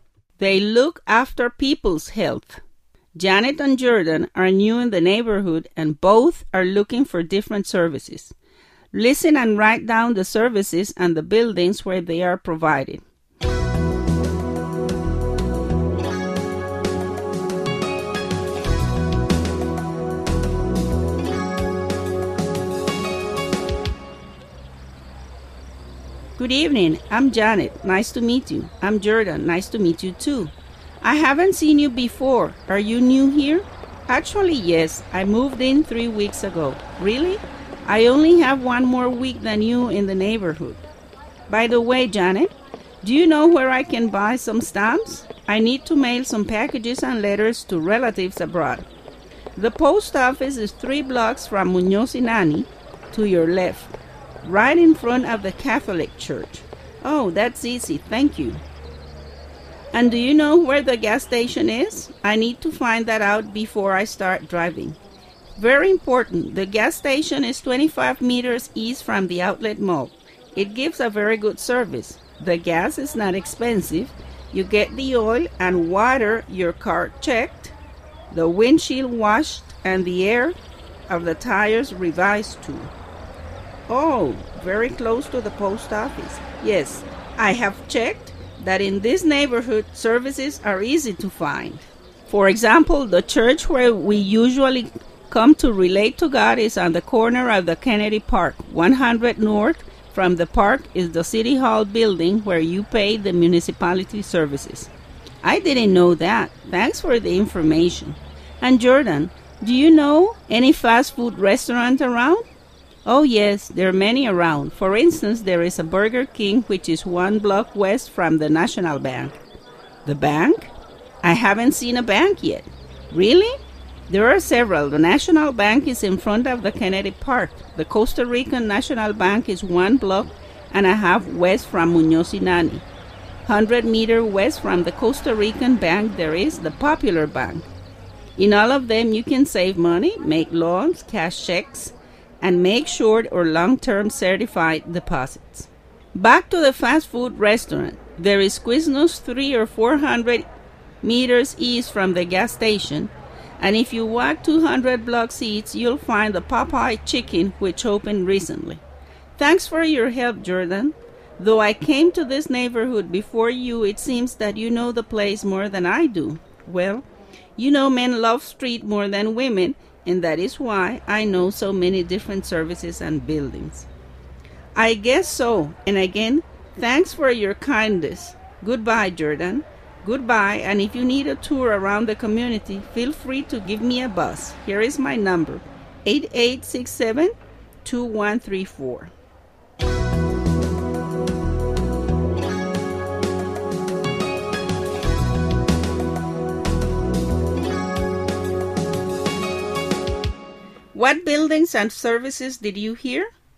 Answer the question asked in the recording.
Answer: 1. Post office, where one buys stamps, letters, and packages.